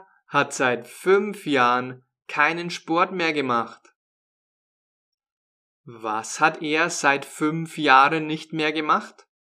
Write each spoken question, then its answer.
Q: Was hat er seit fünf Jahren nicht mehr gemacht?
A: Sport.